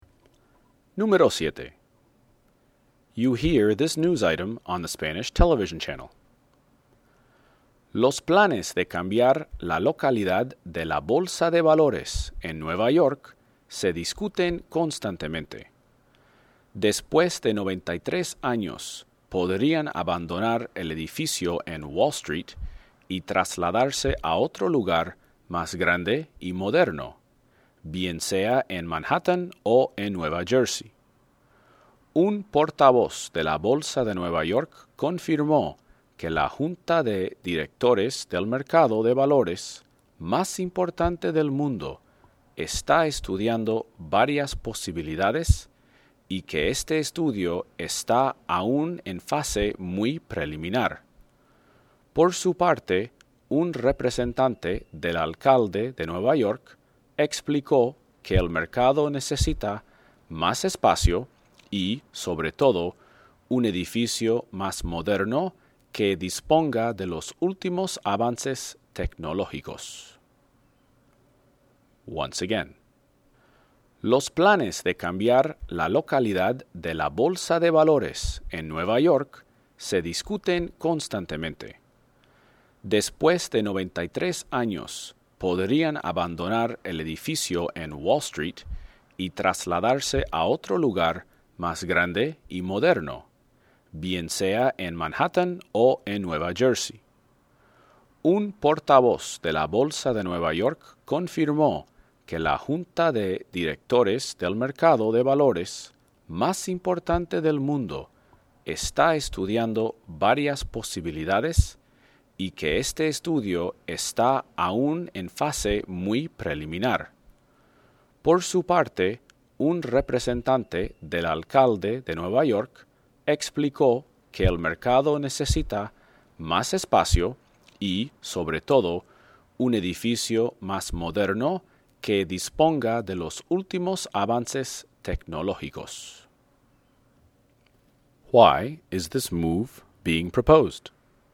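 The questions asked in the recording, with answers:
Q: Why is this move being proposed?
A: The stock exchange needs more space and a more modern, technologically advanced building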